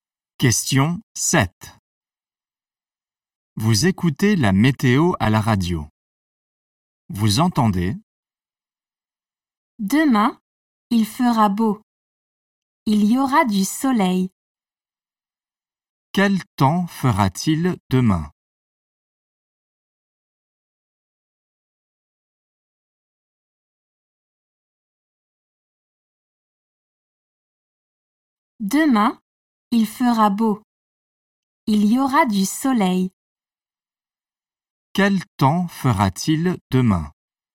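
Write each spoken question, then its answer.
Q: Quel temps fera-t-il demain?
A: Il fera beau, du soleil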